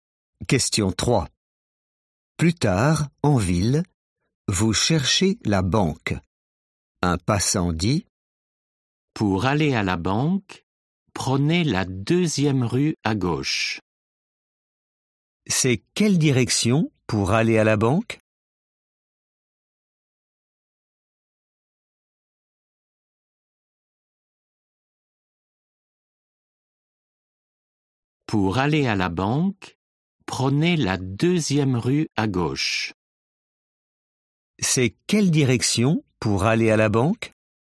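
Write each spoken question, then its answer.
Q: C'est quelle direction pour aller à la banque ?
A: la deuxième rue à gauche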